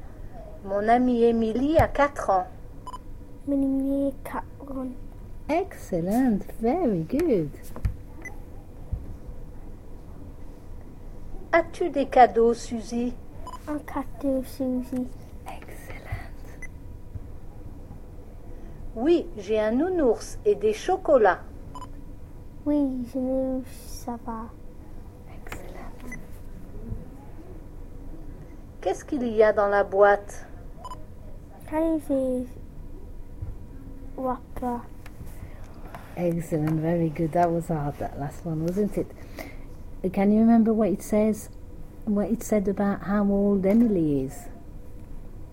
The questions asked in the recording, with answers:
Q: What it said about how old Emily is?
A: she's 4, isn't she, Emily?